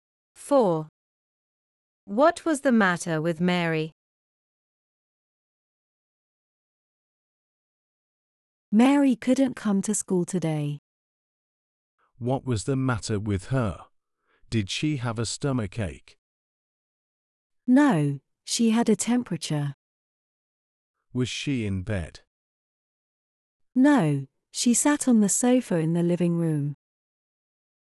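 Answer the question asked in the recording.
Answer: she had a temperature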